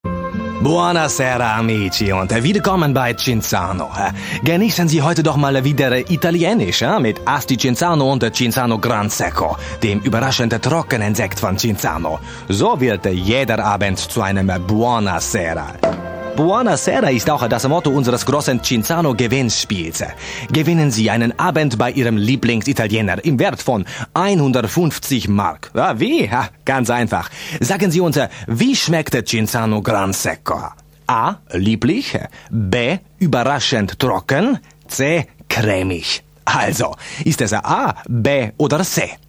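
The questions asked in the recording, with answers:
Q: Sagen Sie uns, wie schmeckt Cinzano Gran Secco?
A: B: Überraschend trocken.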